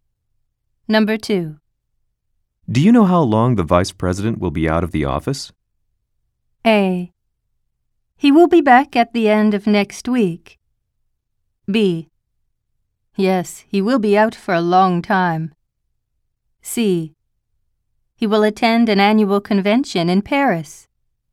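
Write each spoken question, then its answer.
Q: Do you know how long the vice president will be out of the office?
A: A: He will be back at the end of next week.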